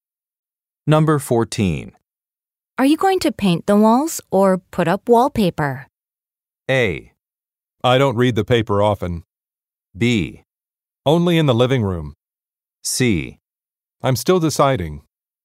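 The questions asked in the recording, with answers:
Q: Are you going to paint the walls or put up wallpaper?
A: C: I'm still deciding.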